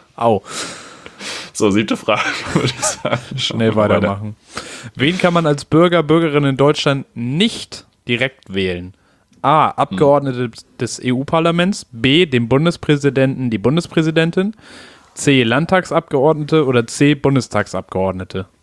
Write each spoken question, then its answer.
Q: Wen kann man als Bürger, Bürgerin in Deutschland nicht direkt wählen?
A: B, dem Bundespräsidenten.